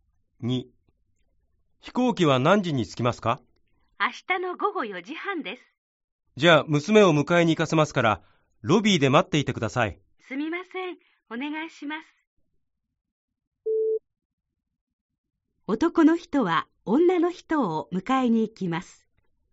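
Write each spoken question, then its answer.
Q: 男の人は女の人を迎えに行きます。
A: ×(迎えに行くのは娘)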